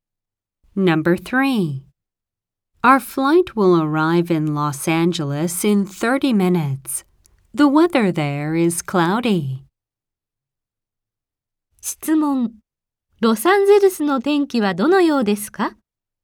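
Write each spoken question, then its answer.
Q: ロサンゼルスの天気はどのようですか?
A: くもり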